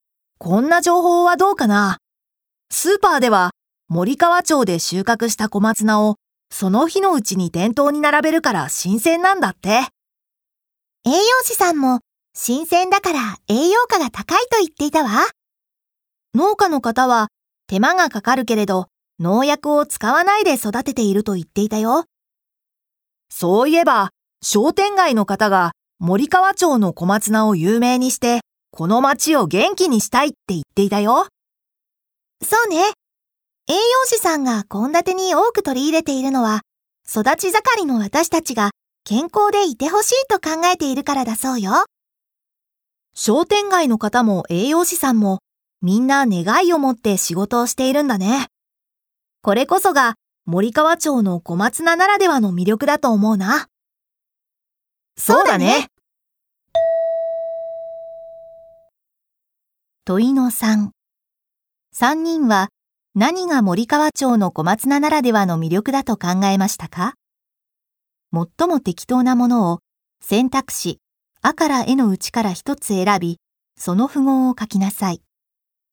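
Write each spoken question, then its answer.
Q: 問いの3。3人は何が森川町の小松菜ならではの魅力だと考えましたか?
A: 小松菜に関わる人々が願いを持って仕事をしていること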